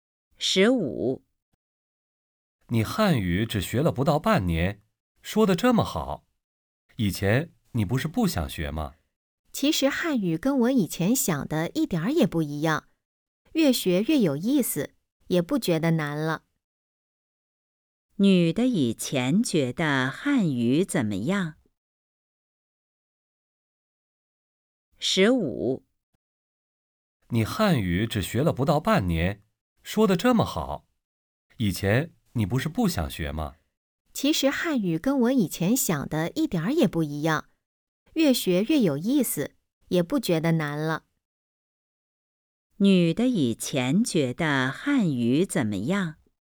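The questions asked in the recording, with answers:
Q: 女的以前觉得汉语怎么样?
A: 很难,没意思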